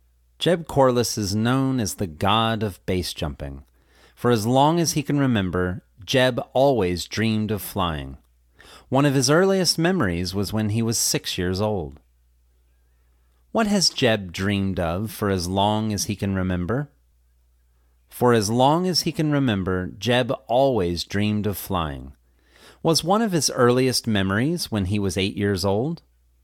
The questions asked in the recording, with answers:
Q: What has Jeb dreamed of for as long as he can remember?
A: For as long as he can remember, Jeb always dreamed of flying.

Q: Was one of his earliest memories when he was 8 years old?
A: No, one of his earliest memories was when he was 6 years old.